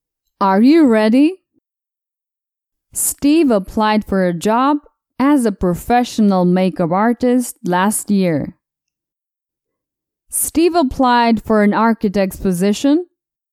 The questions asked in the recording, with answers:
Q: Steve applied for an architect's position.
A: No. Steve applied for a makeup artist position.